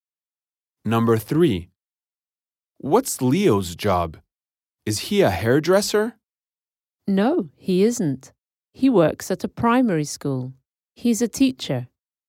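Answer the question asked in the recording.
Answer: A teacher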